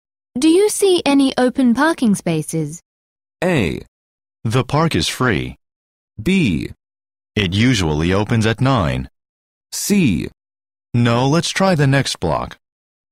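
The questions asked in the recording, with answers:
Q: Do you see any open parking spaces?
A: C: No, let's try the next block.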